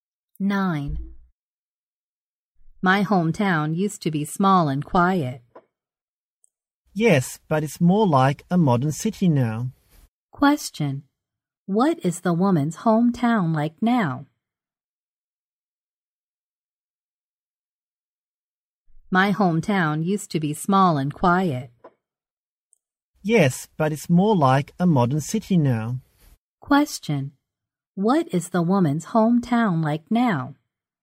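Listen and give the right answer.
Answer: More like a modern city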